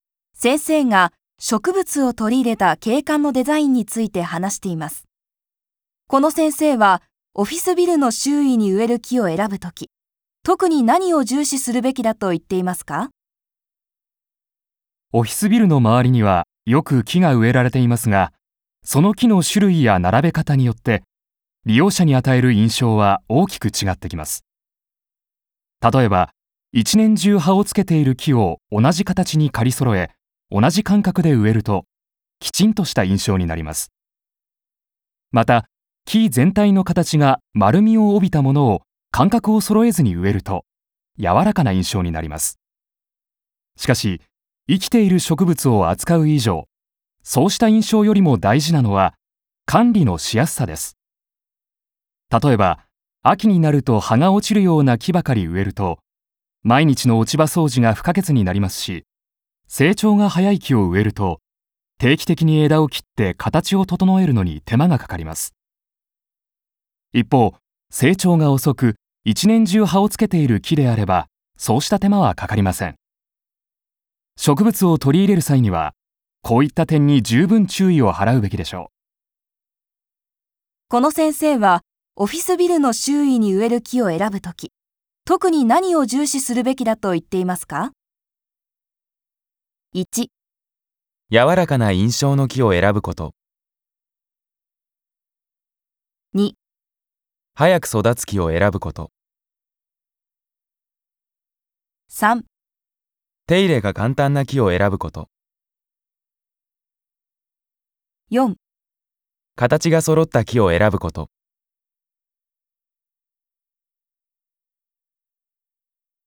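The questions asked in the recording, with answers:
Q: この先生はオフィスビルの周囲に植える木を選ぶとき、特に何を重視するべきだと言っていますか?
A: 3: 手入れが簡単な木を選ぶこと。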